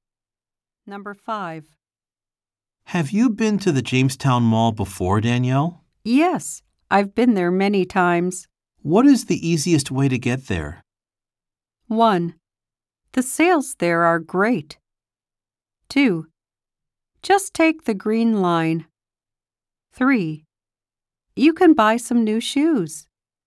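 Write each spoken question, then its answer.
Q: What is the easiest way to get there?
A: 2: Just take the green line.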